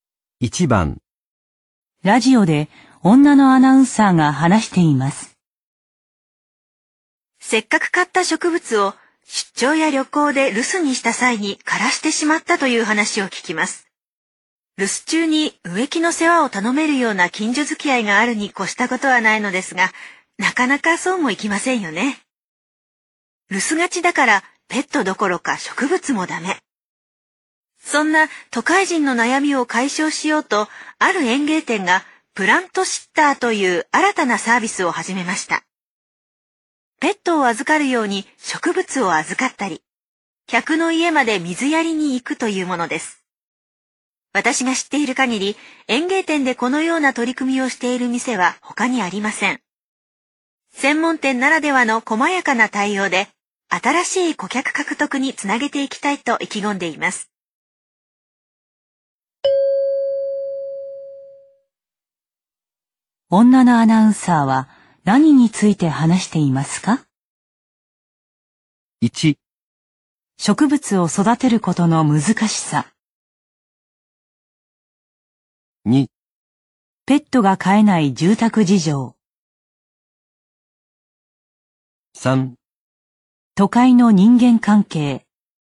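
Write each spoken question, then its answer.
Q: 女のアナウンサーは何につい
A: 4: ある園芸店の新たな取り組み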